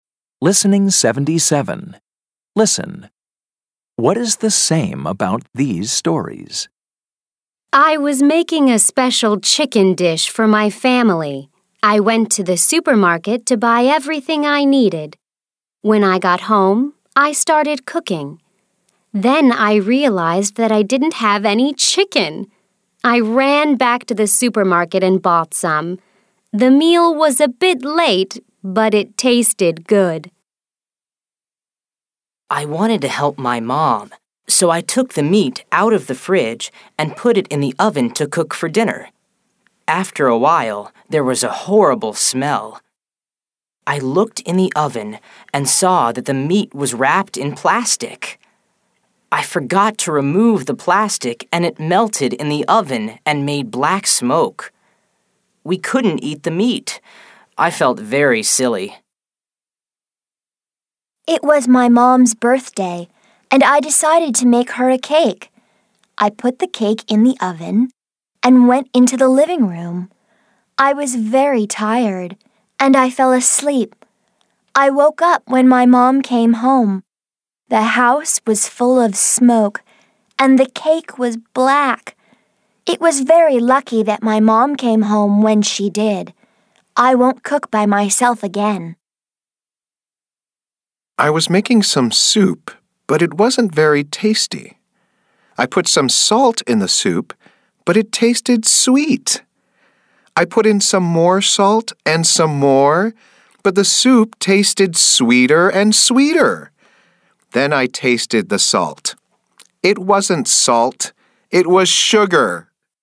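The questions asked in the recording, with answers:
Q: What is the same about these stories?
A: They are all about cooking mistakes/problems.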